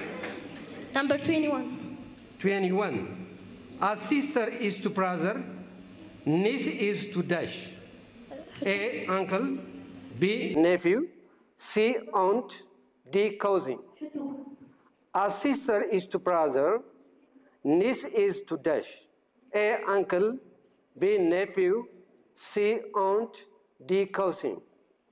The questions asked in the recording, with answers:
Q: A sister is to brother. Niece is to dash.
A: Nephew.